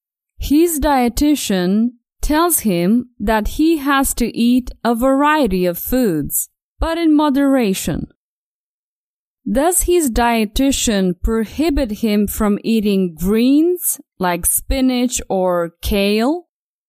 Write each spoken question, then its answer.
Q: Does his dietitian prohibit him from eating greens like spinach or kale?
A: No, no. His dietitian doesn't prohibit him from eating greens.